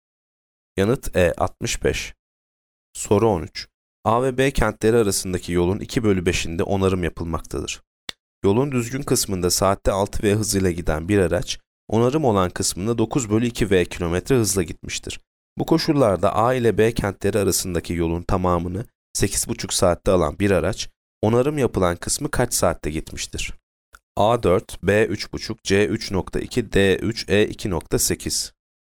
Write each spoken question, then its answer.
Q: Bu koşullarda A ile B kentleri arasındaki yolun tamamını 8,5 saatte alan bir araç, onarım yapılan kısmı kaç saatte gitmiştir?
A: Yanıt A 4.